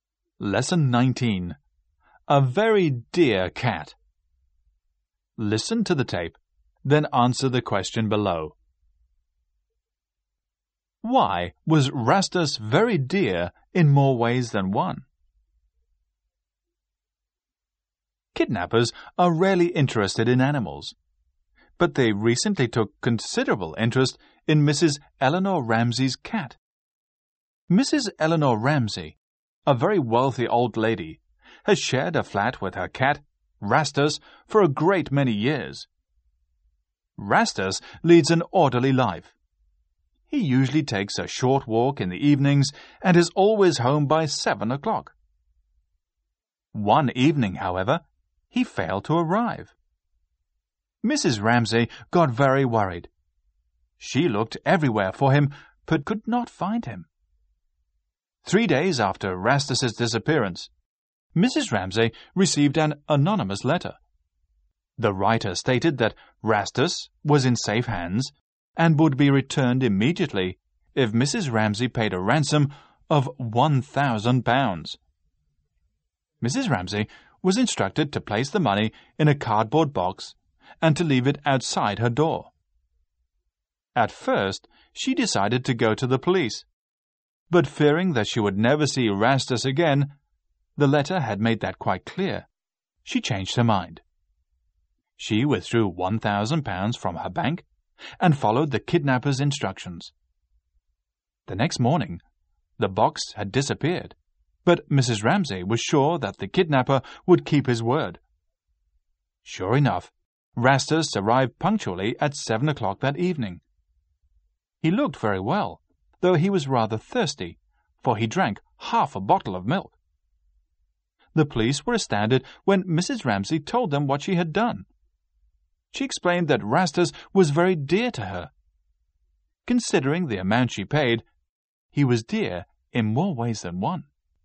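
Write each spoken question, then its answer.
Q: Why was Rastus very dear in more ways than one?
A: Mrs. Ramsey loved him very much, and she paid a ransom of £1,000 to get him back.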